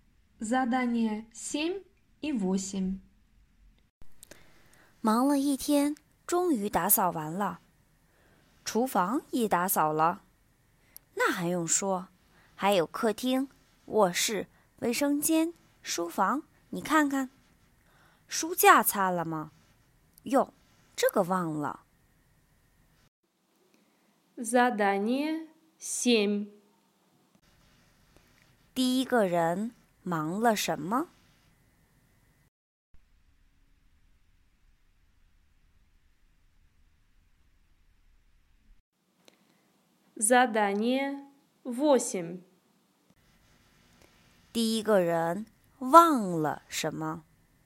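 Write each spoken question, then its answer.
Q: 第一个人忙了什么?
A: 打扫房间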